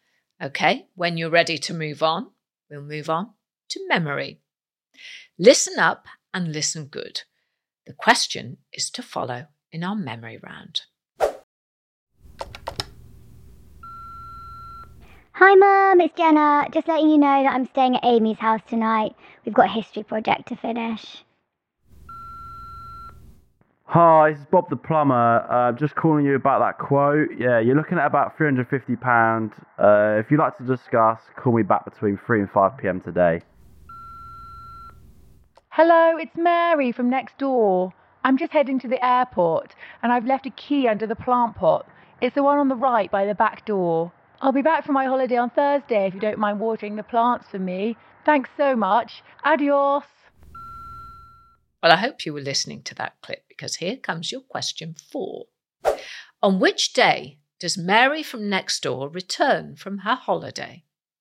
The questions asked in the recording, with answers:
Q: On which day does Mary from next door return from her holiday?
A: The answer was Thursday.